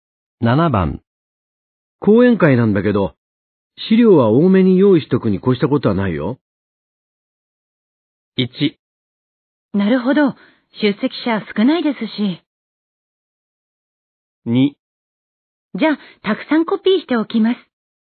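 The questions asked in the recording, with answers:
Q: 講演会なんだけど、資料は多めに用意しとくに越したことはないよ。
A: 2: じゃあ、たくさんコピーしておきます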